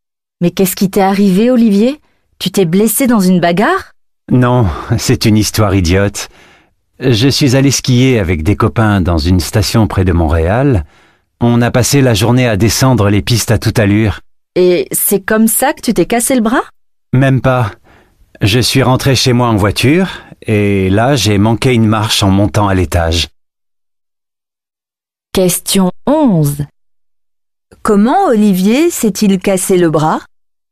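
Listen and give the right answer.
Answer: En manquant une marche dans l'escalier chez lui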